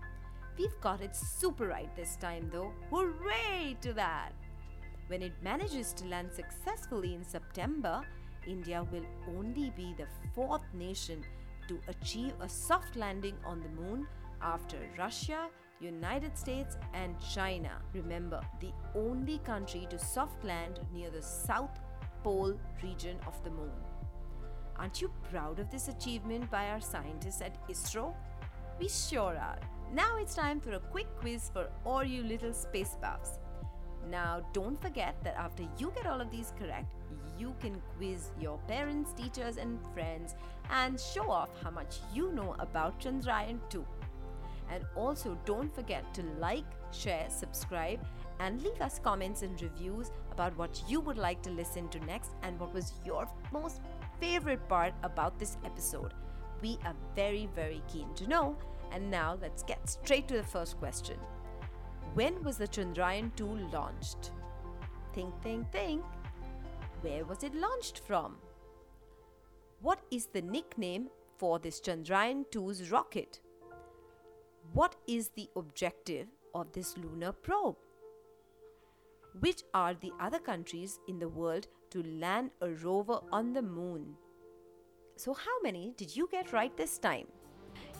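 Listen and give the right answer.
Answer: Russia, the United States and China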